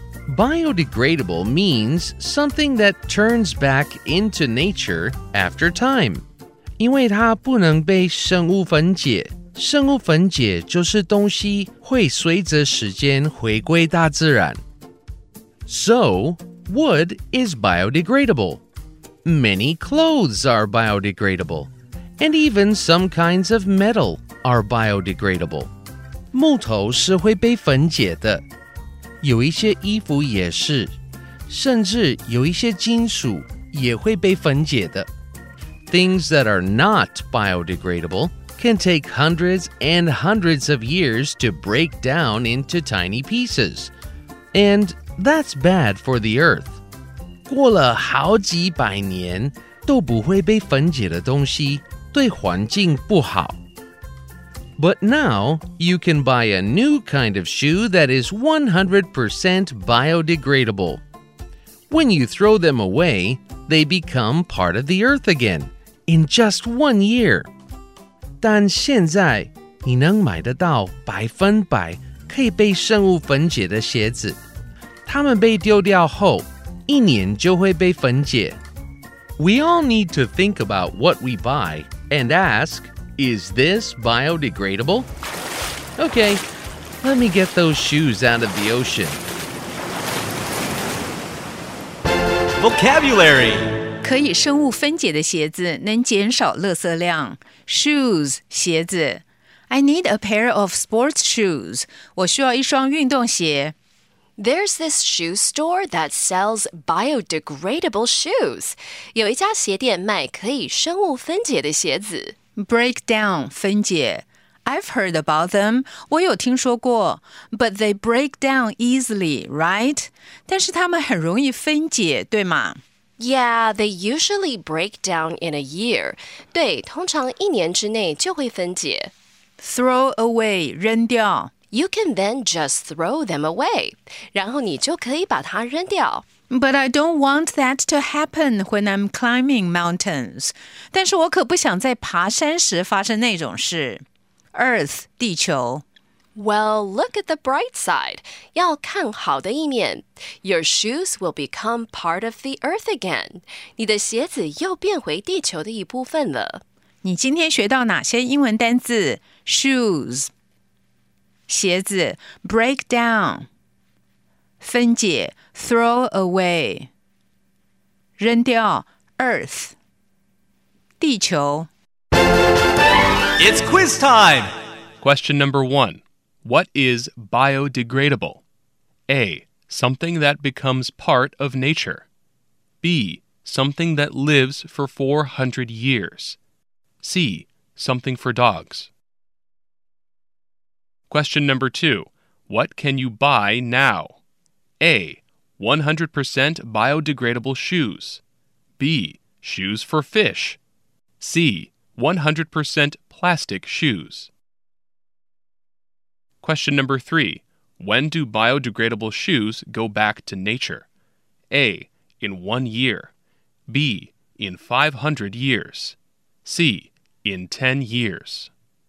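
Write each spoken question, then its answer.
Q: What is biodegradable?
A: A: Something that becomes part of nature.

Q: What can you buy now?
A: A: 100% biodegradable shoes.

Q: When do biodegradable shoes go back to nature?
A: A: In 1 year.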